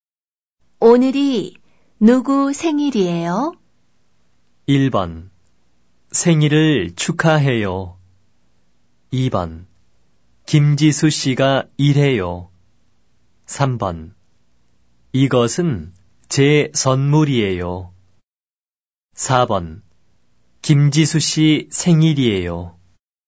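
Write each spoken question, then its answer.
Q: 오늘이 누구 생일이에요?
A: 4: 김지수 씨 생일이에요.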